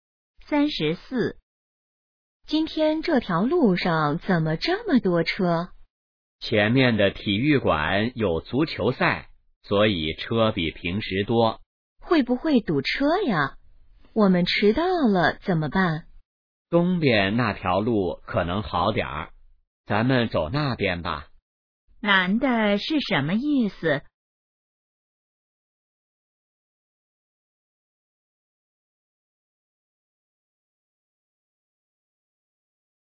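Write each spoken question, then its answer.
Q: 男的是什么意思?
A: 走东边那条路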